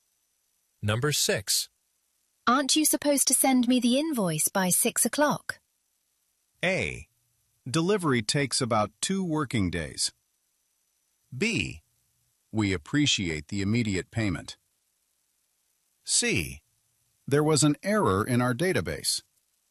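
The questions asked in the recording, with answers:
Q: Aren't you supposed to send me the invoice by 6 o'clock?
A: C: There was an error in our database.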